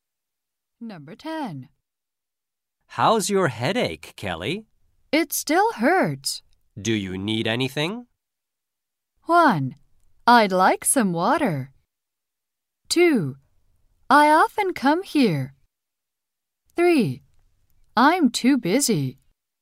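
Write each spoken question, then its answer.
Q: Do you need anything?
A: 1: I'd like some water.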